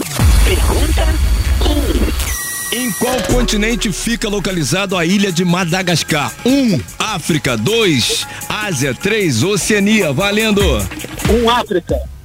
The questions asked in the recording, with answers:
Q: Em qual continente fica localizado a ilha de Madagascar?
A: 1. Um, África.